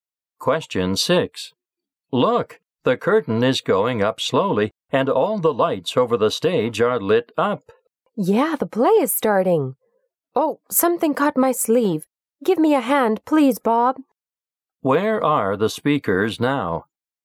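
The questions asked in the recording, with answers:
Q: Where are the speakers now?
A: In a theater.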